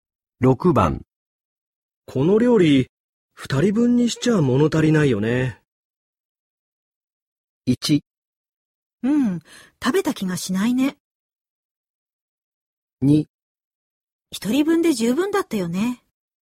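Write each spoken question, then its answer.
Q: この料理2人分にしちゃ物足りないよね。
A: 1: うん、食べた気がしないね。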